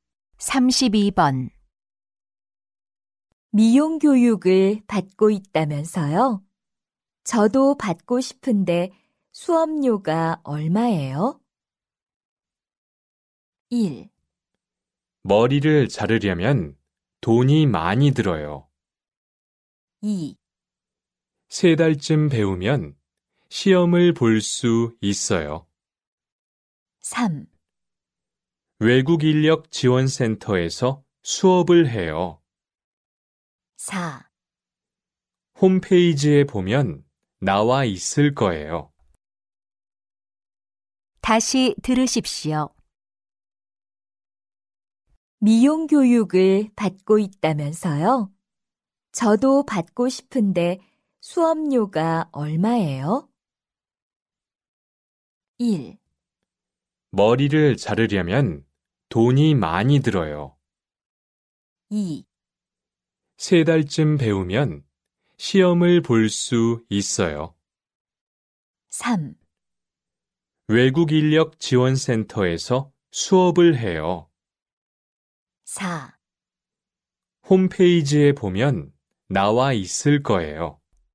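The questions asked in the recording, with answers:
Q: 미용 교육을 받고 있다면서요? 저도 받고 싶은데 수업료가 얼마예요?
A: 4: 홈페이지에 보면 나와 있을 거예요.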